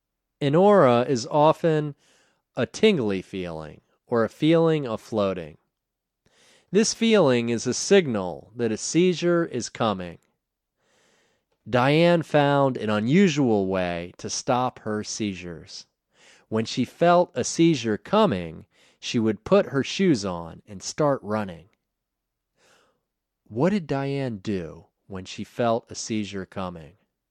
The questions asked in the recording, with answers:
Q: What did Diane do when she felt a seizure coming?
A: When she felt a seizure coming, she would put her shoes on and start running.